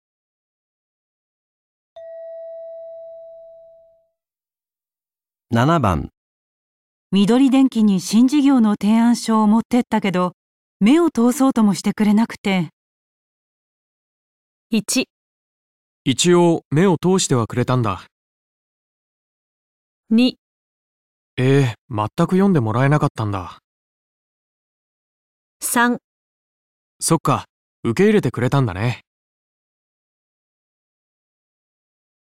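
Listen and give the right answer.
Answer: へぇー、まったく読んでもらえなかったんだ

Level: N1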